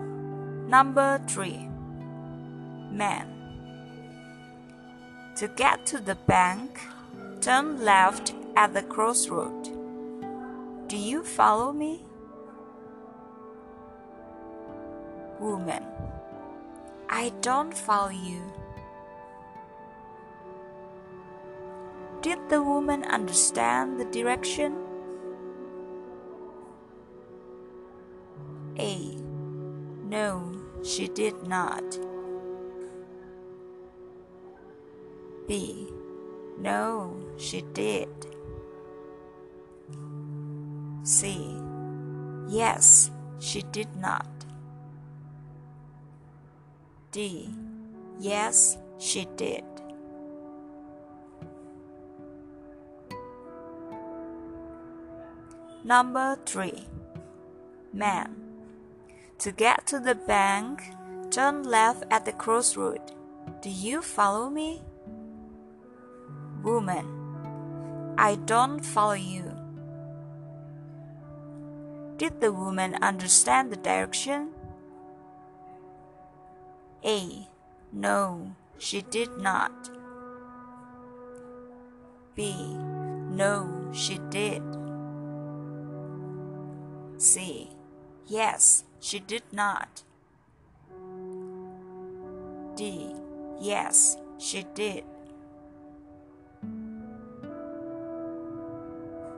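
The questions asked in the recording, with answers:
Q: Did the woman understand the direction?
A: A: No, she did not.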